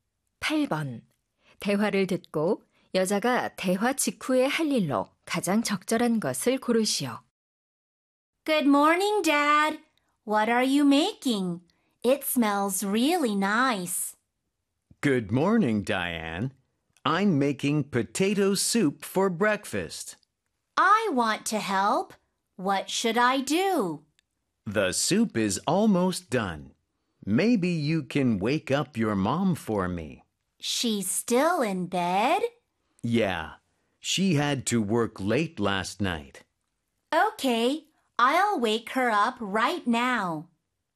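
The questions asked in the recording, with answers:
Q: 대화를 듣고 여자가 대화 직후에 할 일로 가장 적절한 것을 고르시오.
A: 엄마 깨우기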